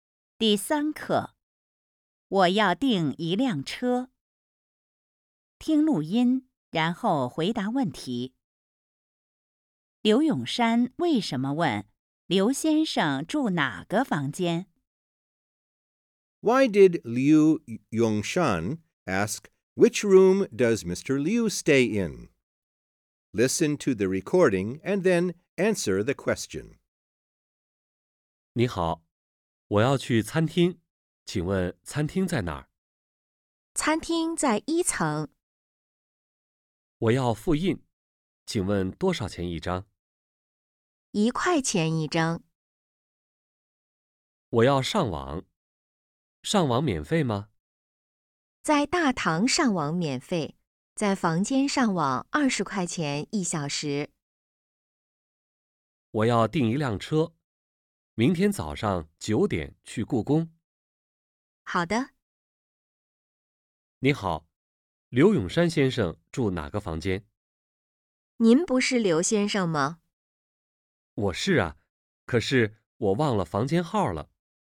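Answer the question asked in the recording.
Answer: 因为他忘了自己的房间号。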